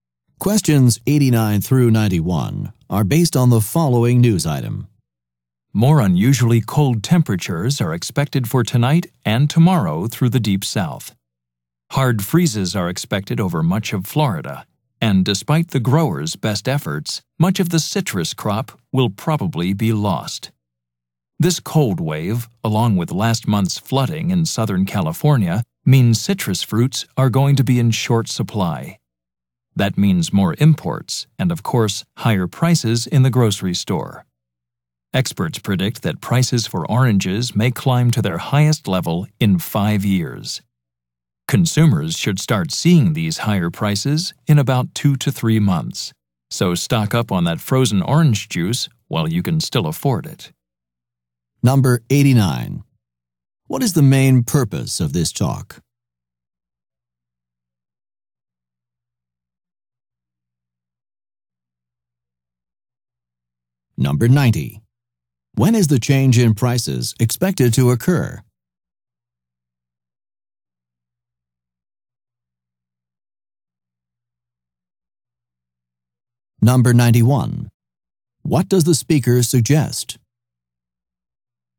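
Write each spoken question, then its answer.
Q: What is the main purpose of this talk?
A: To warn that citrus prices will rise

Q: When is the change in prices expected to occur?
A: In about 2 to 3 months

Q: What does the speaker suggest?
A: Stock up on frozen orange juice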